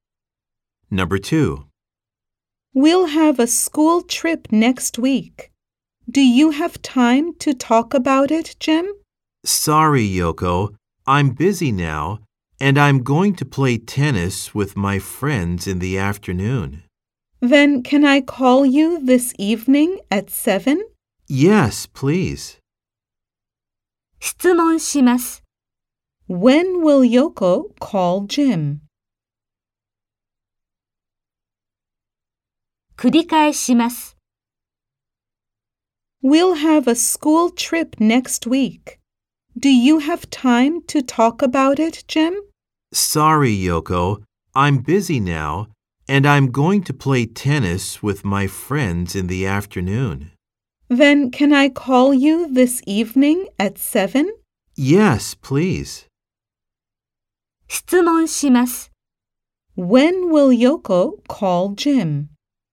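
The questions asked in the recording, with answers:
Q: When will Yoko call Jim?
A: This evening at 7.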